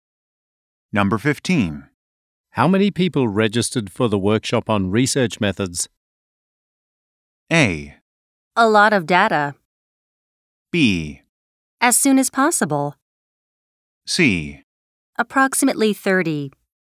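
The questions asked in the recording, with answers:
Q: How many people registered for the workshop on research methods?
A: C: Approximately 30.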